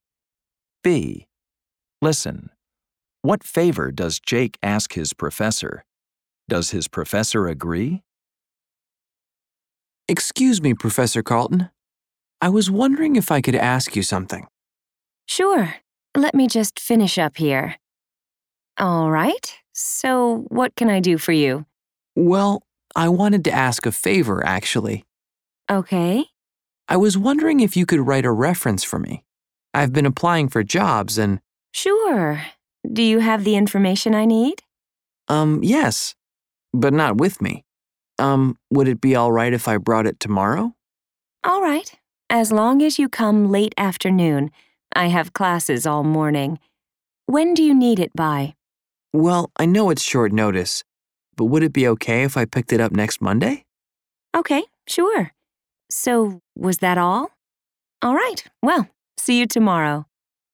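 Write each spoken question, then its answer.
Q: What favor does Jake ask his professor?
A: To write a reference for him

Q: Does his professor agree?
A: Yes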